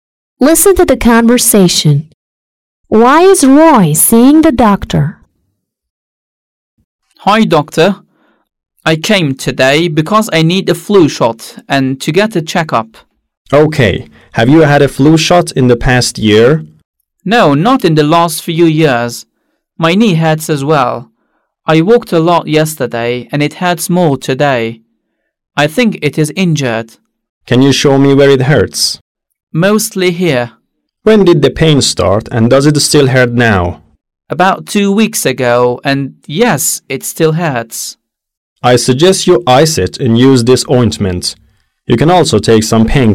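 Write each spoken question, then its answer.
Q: Why is Roy seeing the doctor?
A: To get a flu shot and a checkup (his knee also hurts)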